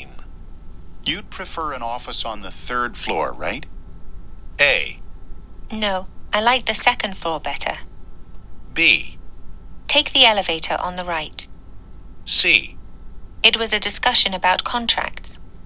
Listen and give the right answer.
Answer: 今日の正答は選択肢 A でした。